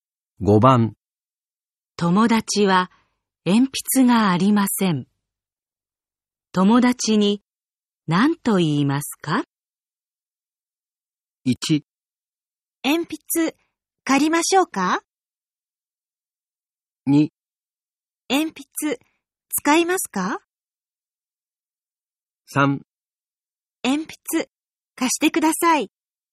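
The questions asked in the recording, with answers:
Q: 友達は鉛筆がありません。友達に何と言いますか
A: 2: 鉛筆使いますか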